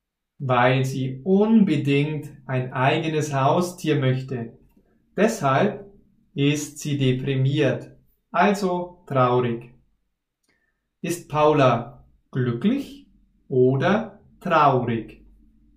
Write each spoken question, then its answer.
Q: Ist Paula glücklich oder traurig?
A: Sie ist traurig. Paula ist traurig.